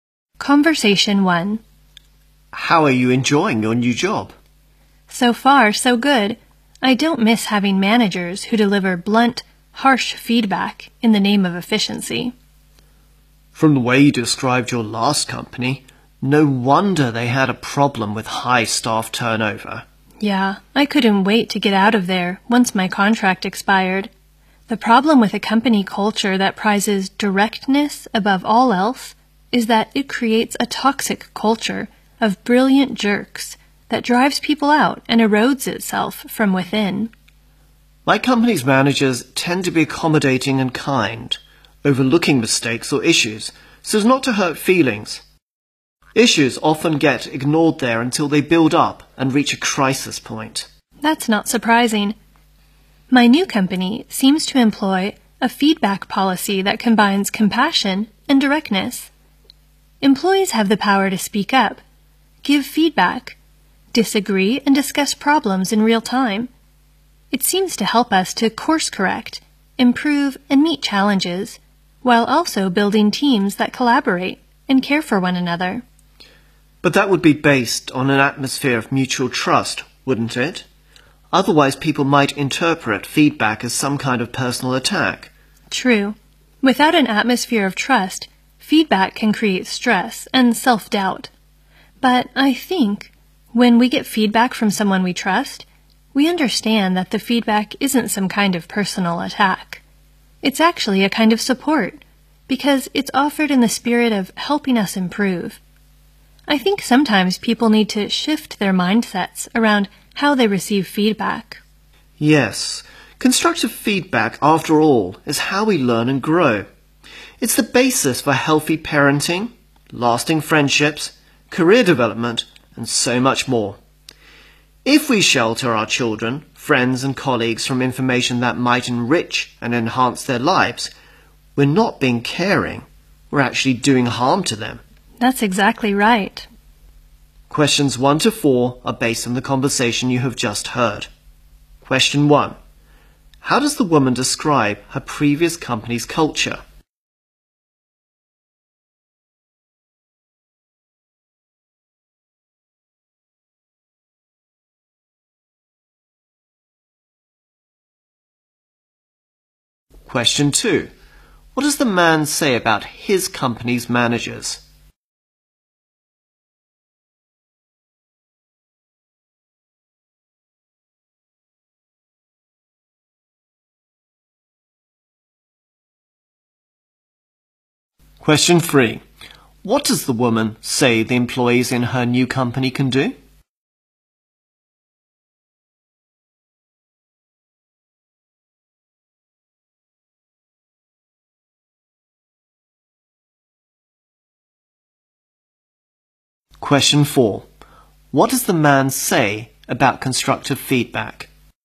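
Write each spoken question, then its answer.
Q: How does the woman describe her previous company's culture?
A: It valued directness above all, so managers gave blunt, harsh feedback and drove people out.

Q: What does the man say about his company's managers?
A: They are accommodating and kind and overlook mistakes so they won't hurt feelings.

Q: What does the woman say the employees in her new company can do?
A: Speak up, give feedback, disagree and discuss problems in real time.

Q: What does the man say about constructive feedback?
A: It is how we learn and grow.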